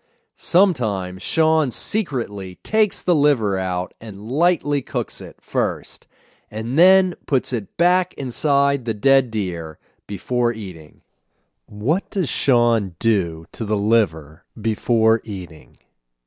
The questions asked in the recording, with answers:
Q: What does Sean do to the liver before eating?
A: Sometimes Sean secretly cooks it first before eating.